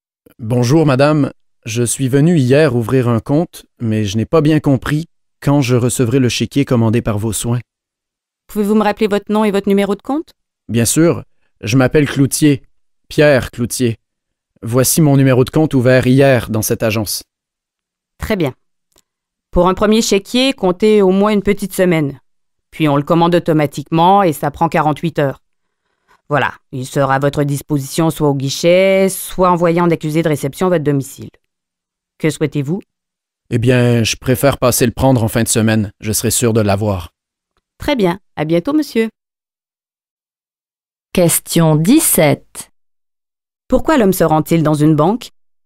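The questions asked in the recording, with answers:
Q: Pourquoi l'homme se rend-il dans une banque?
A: Pour savoir quand il recevra son premier chéquier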